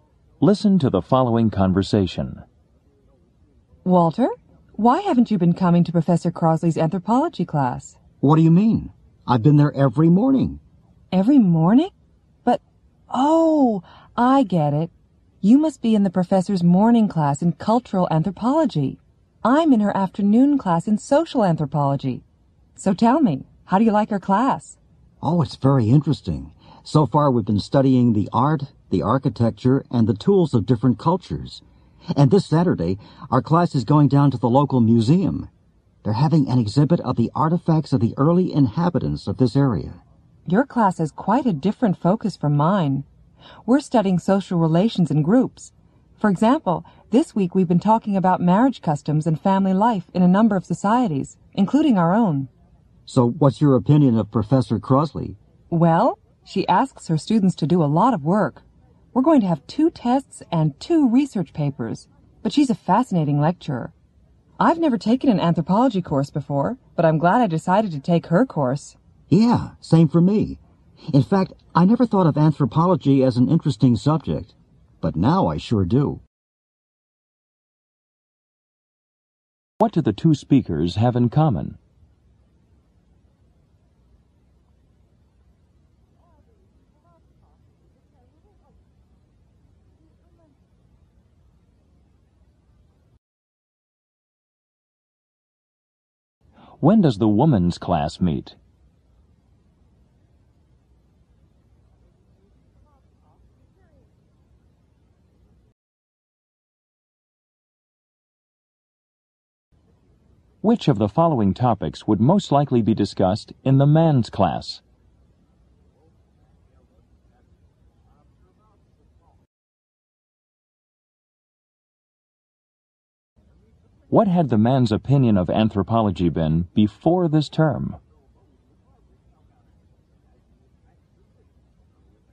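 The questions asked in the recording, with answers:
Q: What do the 2 speakers have in common?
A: They both take anthropology with Professor Crosley.

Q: When does the woman's class meet?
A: In the afternoon.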